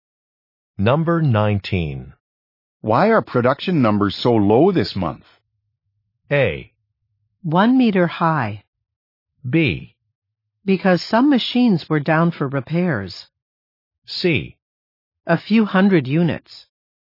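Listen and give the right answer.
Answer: B: Because some machines were down for repairs.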